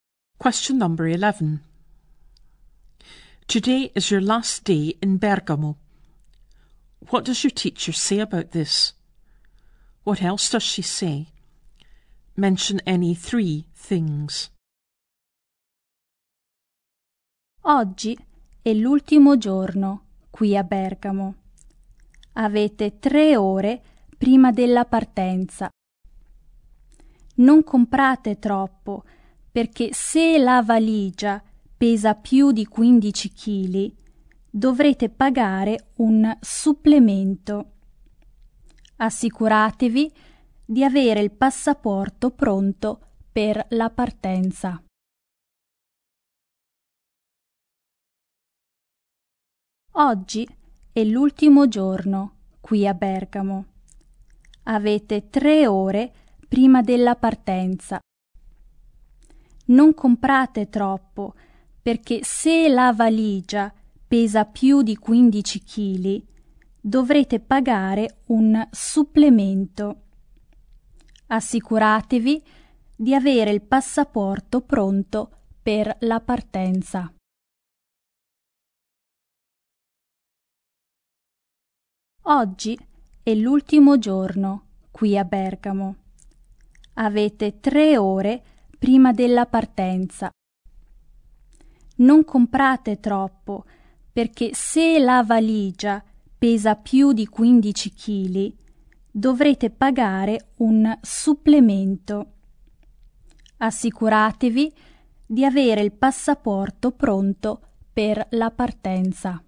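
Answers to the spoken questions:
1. You have three hours before leaving
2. Don't buy too much; if your suitcase weighs over 15 kg you'll pay a supplement; have your passport ready for departure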